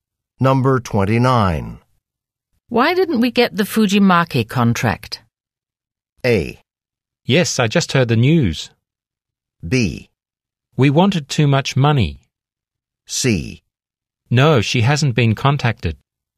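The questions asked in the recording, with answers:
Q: Why didn't we get the Fujimaki contract?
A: B: We wanted too much money.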